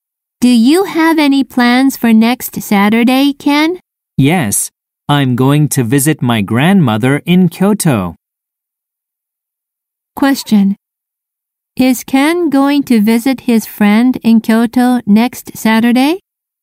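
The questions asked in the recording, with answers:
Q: Is Ken going to visit his friend in Kyoto next Saturday?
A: No, he isn't. He is going to visit his grandmother.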